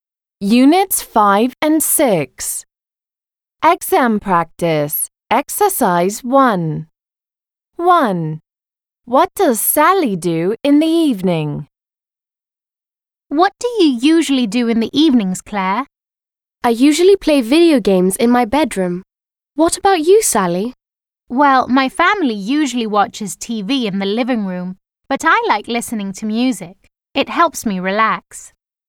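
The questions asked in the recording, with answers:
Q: What does Sally do in the evening?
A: She listens to music.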